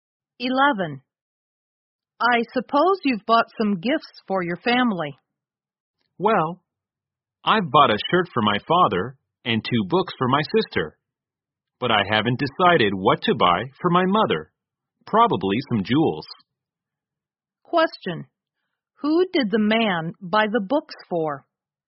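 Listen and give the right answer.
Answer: His sister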